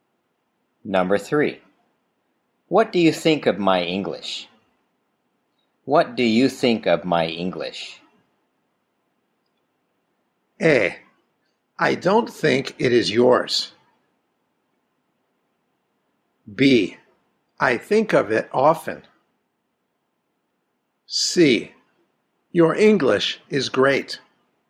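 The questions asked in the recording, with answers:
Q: What do you think of my English?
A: C: Your English is great.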